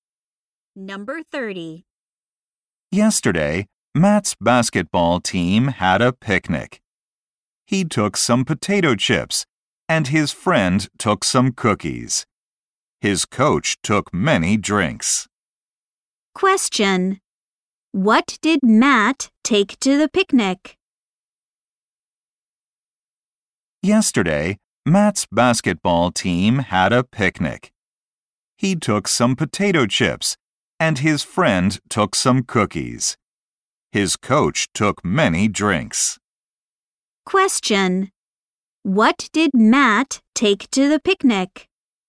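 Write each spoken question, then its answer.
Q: What did Matt take to the picnic?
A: Potato chips.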